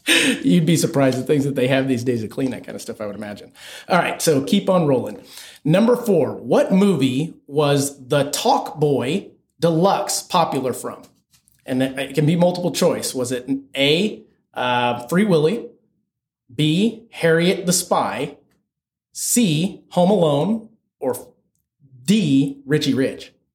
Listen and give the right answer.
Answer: It was Home Alone.